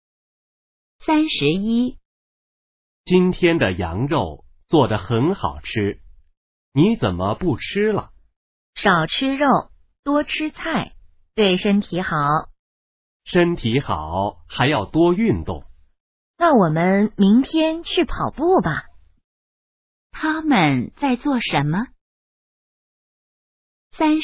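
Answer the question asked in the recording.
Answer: 吃饭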